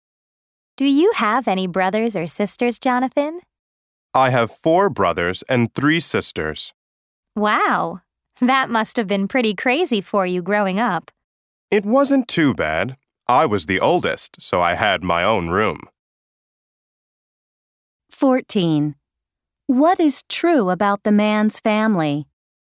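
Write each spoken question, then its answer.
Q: What is true about the man's family?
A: He is the oldest of eight children (4 brothers and 3 sisters)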